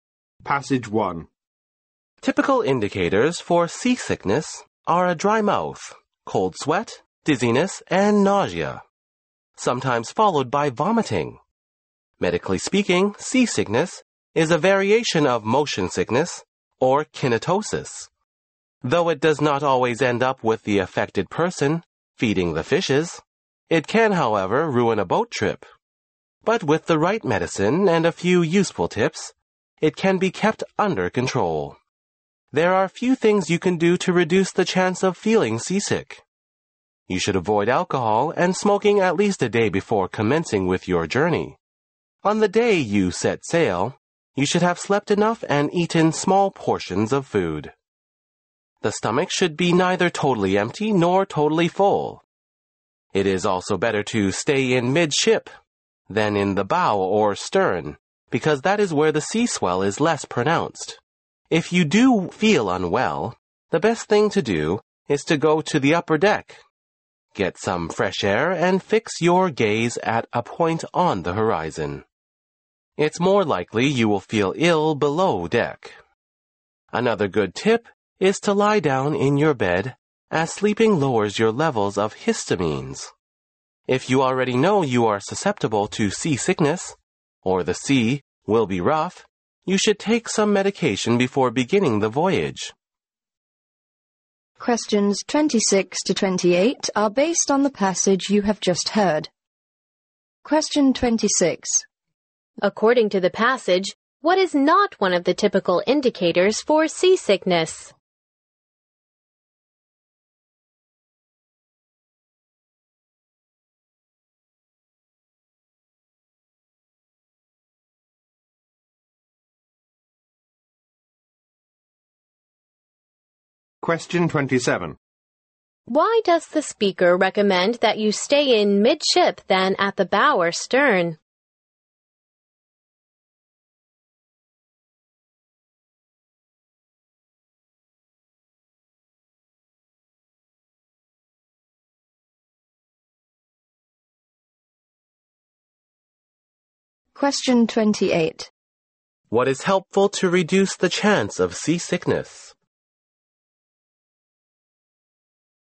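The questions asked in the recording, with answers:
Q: Why does the speaker recommend that you stay in midship than at the bow or stern?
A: The sea swell is less pronounced there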